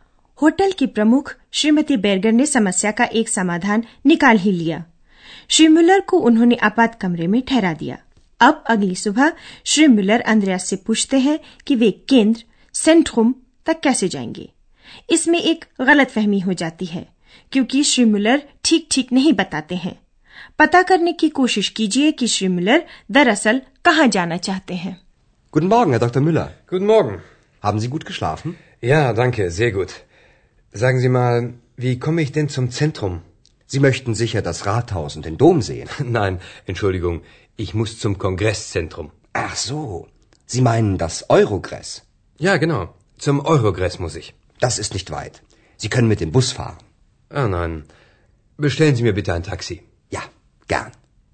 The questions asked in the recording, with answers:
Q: पता करने की कोशिश कीजिए कि श्री मुलर दरअसल कहाँ जाना चाहते हैं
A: श्रीमुलर शहर केंद्र stud Centrum नहीं जाना